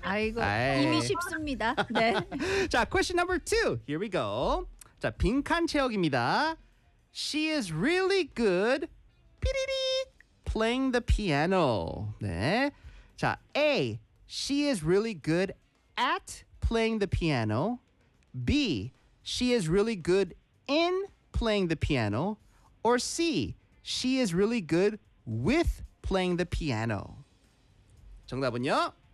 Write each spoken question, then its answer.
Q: She is really good playing the piano.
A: That's right. 네. 왜냐면 she is really good at playing the piano.